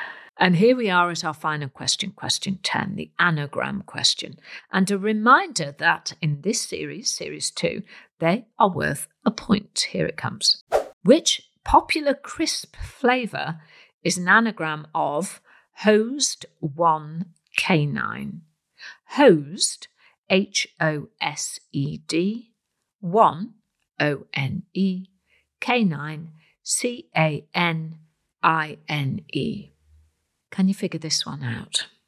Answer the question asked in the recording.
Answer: And the answer was my favourite flavour cheese and onion.